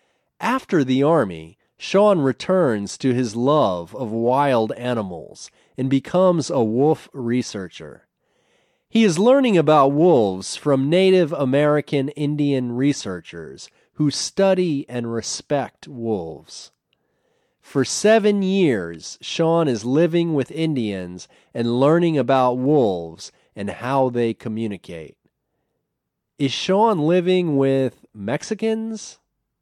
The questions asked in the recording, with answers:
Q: Is Sean living with Mexicans?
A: No, he isn't living with Mexicans. He is living with Native American Indians.